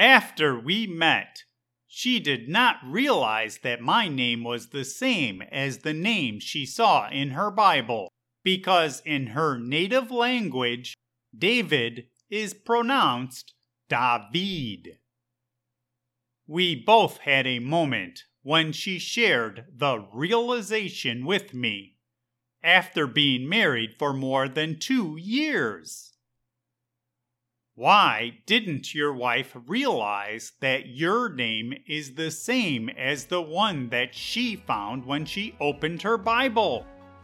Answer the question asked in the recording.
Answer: My wife did not realize that I have the same name because the name David is pronounced differently in Spanish, her native language.